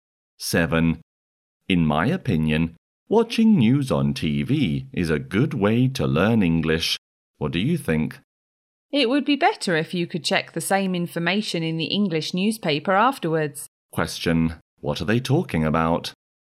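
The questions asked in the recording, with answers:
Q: What are they talking about?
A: Ways to learn English.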